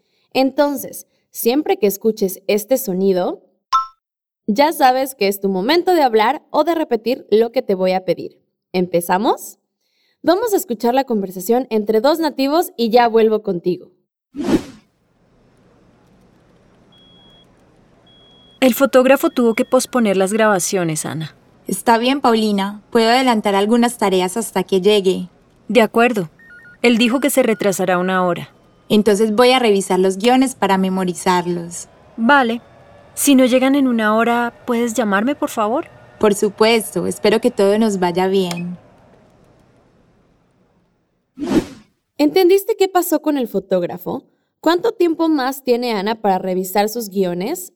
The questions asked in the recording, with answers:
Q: ¿Entendiste qué pasó con el fotógrafo?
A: Posponer las grabaciones.